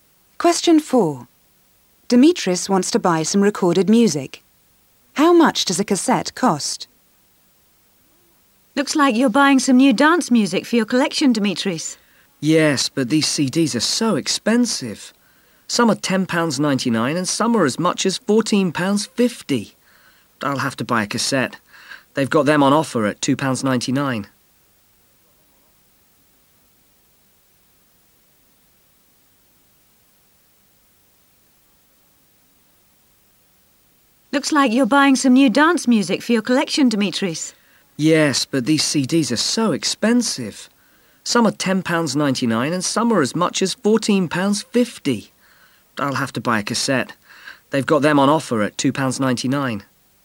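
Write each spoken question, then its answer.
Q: How much does a cassette cost?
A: £2.99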